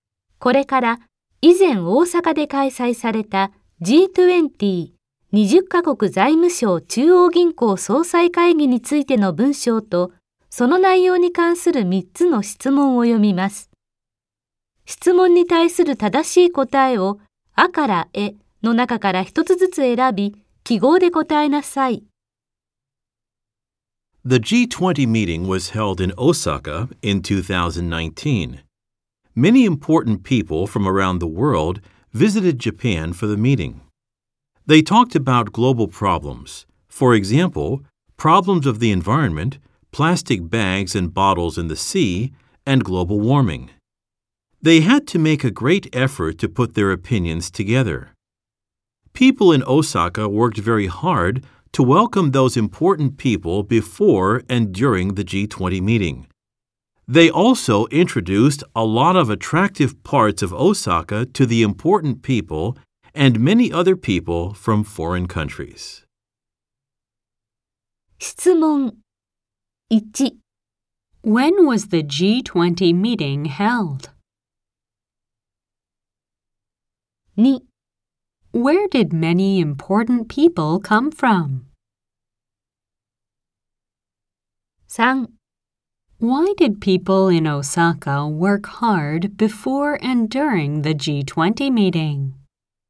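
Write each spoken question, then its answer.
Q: When was the G20 meeting held?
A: In 2019

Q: Where did many important people come from?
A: From around the world

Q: Why did people in Osaka work hard before and during the G20 meeting?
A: To welcome the important people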